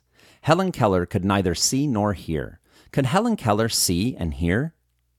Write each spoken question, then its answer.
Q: Could Helen Keller see and hear?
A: No, Helen Keller could neither see nor hear.